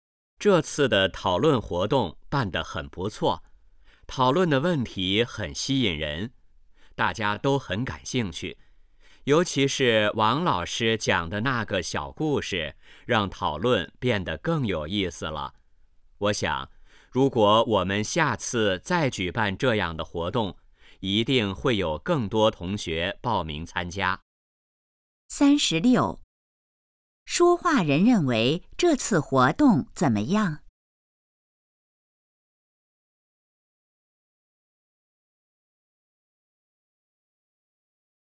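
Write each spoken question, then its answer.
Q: 说话人认为这次活动怎么样?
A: 很不错

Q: 王老师在活动中做了什么?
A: 讲了一个小故事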